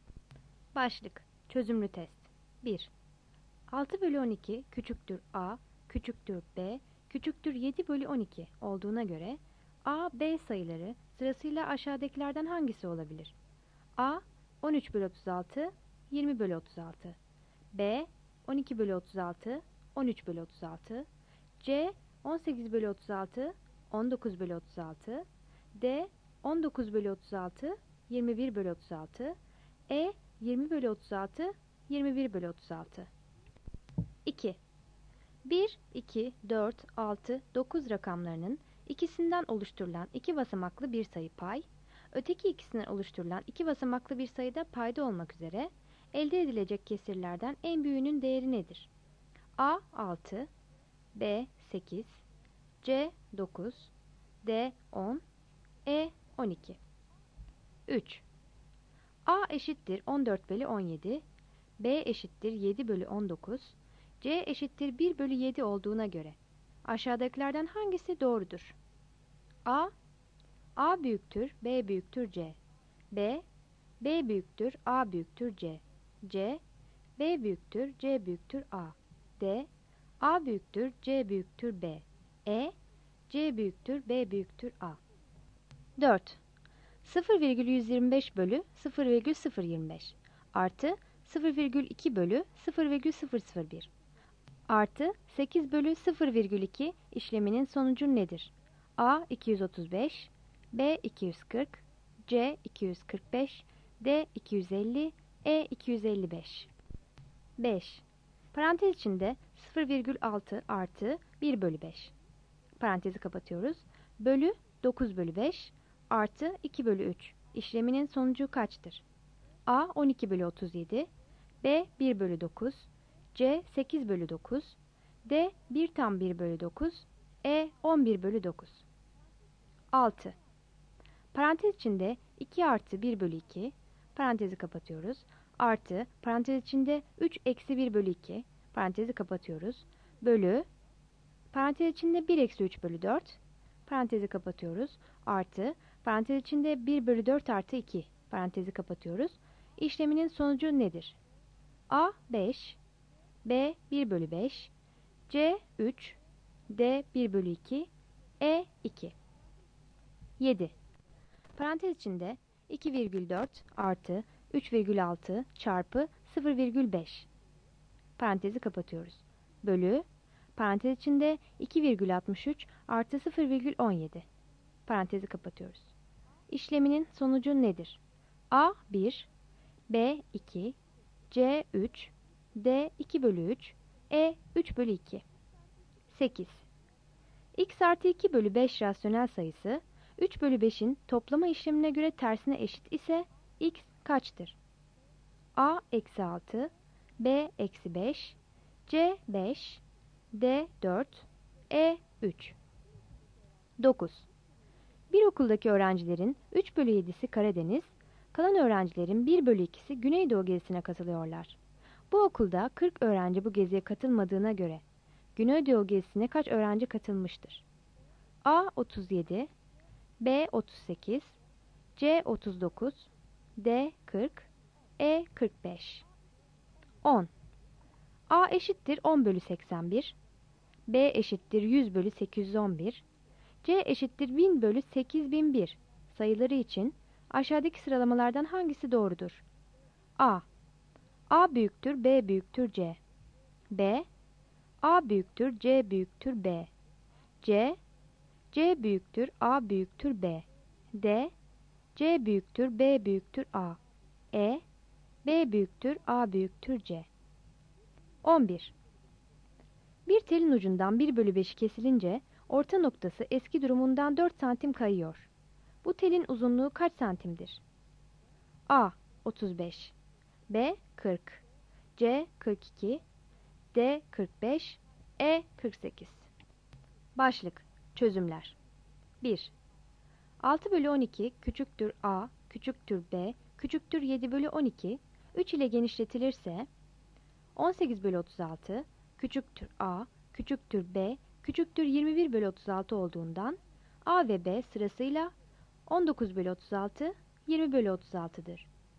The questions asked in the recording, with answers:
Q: 1, 2, 4, 6, 9 rakamlarının ikisinden oluşturulan iki basamaklı bir sayı pay, öteki ikisinden oluşturulan iki basamaklı bir sayı da payda olmak üzere elde edilecek kesirlerden en büyüğünün değeri nedir?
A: Yanıt B'dir.

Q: A eşittir 14 bölü 17, B eşittir 7 bölü 19, C eşittir 1 bölü 7 olduğuna göre aşağıdakilerden hangisi doğrudur?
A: Yanıt A.

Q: 0,125 bölü 0,025 artı 0,2 bölü 0,001 artı 8 bölü 0,2 işleminin sonucu nedir?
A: Yanıt C'dir.

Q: Bölü 9 bölü 5 artı 2 bölü 3 işleminin sonucu kaçtır?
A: Yanıt D'dir.

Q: Parantez içinde 2 artı 1 bölü 2, parantezi kapatıyoruz, artı parantez içinde 3 eksi 1 bölü 2, parantezi kapatıyoruz, bölü, parantez içinde 1 eksi 3 bölü 4, parantezi kapatıyoruz, artı parantez içinde 1 bölü 4 artı 2, parantezi kapatıyoruz, işleminin sonucu nedir?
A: Yanıt E'dir.

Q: Parantezi kapatıyoruz. İşleminin sonucu nedir?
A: Yanıt E'dir.

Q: X artı 2/5 rasyonel sayısı, 3/5'in toplama işlemine göre tersine eşit ise x kaçtır?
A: Yanıt B'dir.

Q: Bu okulda 40 öğrenci bu geziye katılmadığına göre Güneydoğu gezisine kaç öğrenci katılmıştır?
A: Yanıt D'dir.

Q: A eşittir 10/81, B eşittir 100/811, C eşittir 1000/8001 sayıları için aşağıdaki sıralamalardan hangisi doğrudur?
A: Yanıt C.

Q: Bu telin uzunluğu kaç santimdir?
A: Yanıt B'dir.